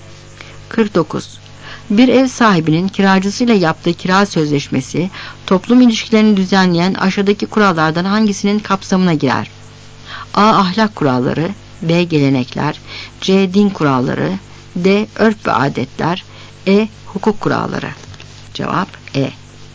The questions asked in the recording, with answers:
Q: Bir ev sahibinin kiracısıyla yaptığı kira sözleşmesi, toplum ilişkilerini düzenleyen aşağıdaki kurallardan hangisinin kapsamına girer?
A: Cevap E.